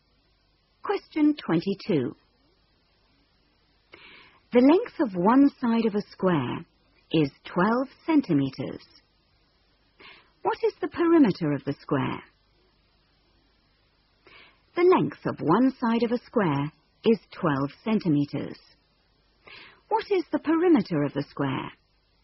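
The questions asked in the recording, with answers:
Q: What is the perimeter of the square?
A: 48 centimetres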